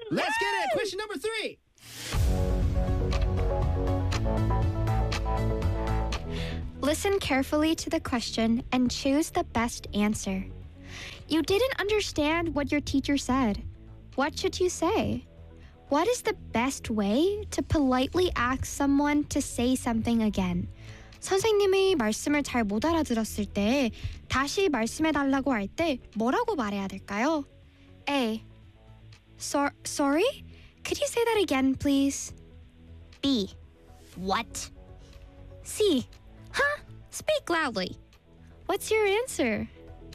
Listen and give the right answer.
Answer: 맞췄어요.